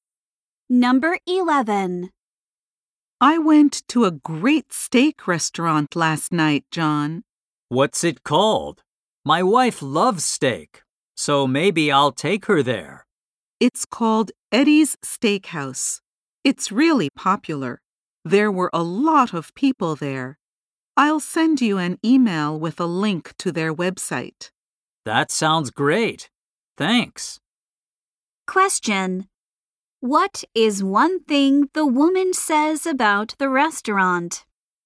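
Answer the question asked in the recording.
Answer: It is really popular.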